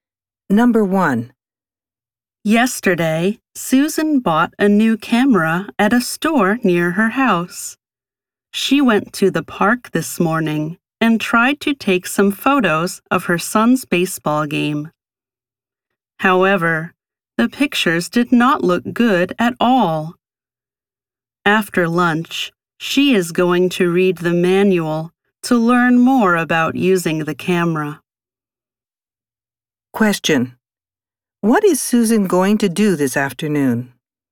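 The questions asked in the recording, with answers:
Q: What is Susan going to do this afternoon?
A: Read the camera's manual to learn more about using it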